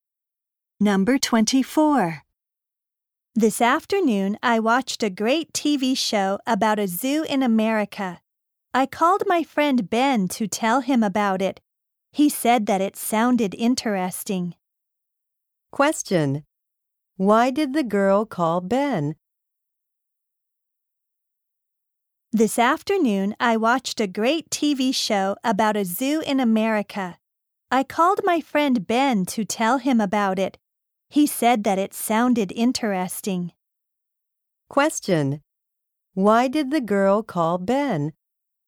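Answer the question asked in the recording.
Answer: To tell him about a TV show about a zoo.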